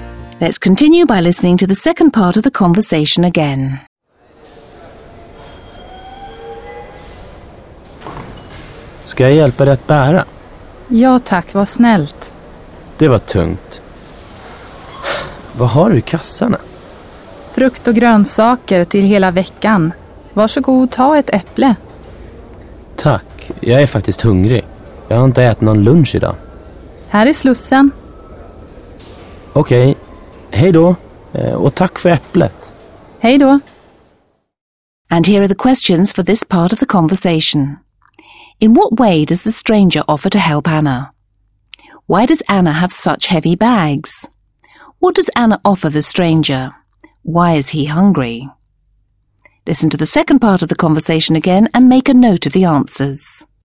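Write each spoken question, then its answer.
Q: In what way does the stranger offer to help Anna?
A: He offers to carry her bags

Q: Why does Anna have such heavy bags?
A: She has fruit and vegetables for the whole week

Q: What does Anna offer the stranger?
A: An apple

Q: Why is he hungry?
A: He hasn't eaten any lunch today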